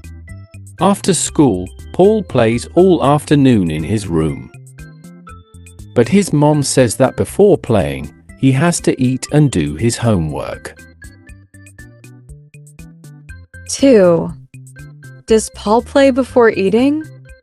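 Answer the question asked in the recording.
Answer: No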